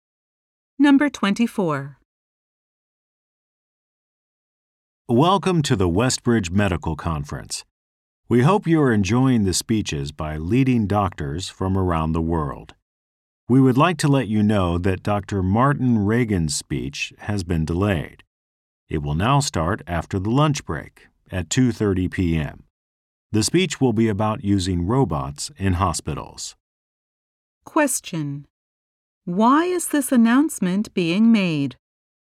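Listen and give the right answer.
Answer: Dr. Martin Reagan's speech has been delayed until 2:30 p.m.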